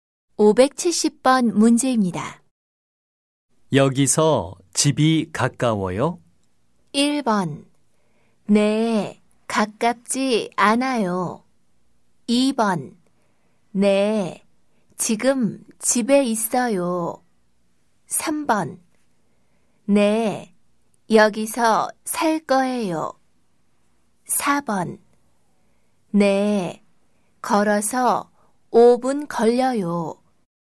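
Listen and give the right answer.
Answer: 4: 네, 걸어서 5분 걸려요.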